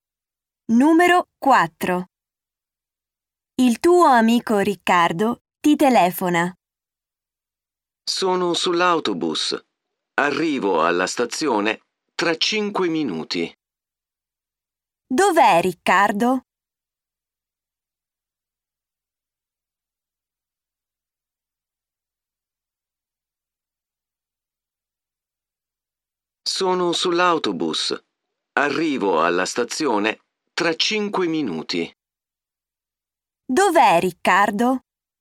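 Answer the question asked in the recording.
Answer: Sull'autobus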